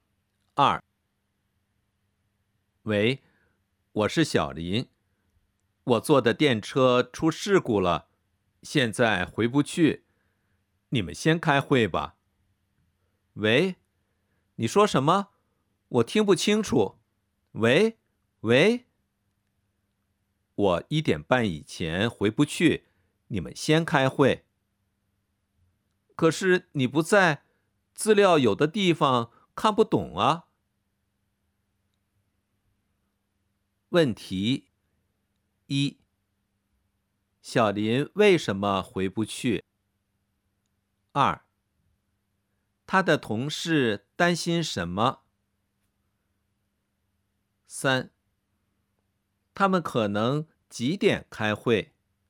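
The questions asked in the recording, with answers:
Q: 小林为什么回不去?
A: 他坐的电车出事故了

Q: 他的同事担心什么?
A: 小林不在,资料有的地方看不懂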